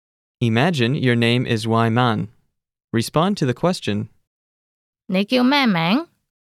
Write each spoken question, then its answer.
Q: 你叫咩名?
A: 我叫偉文。